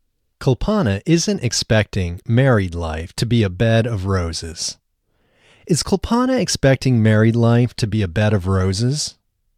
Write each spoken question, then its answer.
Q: Is Kulpana expecting married life to be a bed of roses?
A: No, Kulpana isn't expecting married life to be a bed of roses.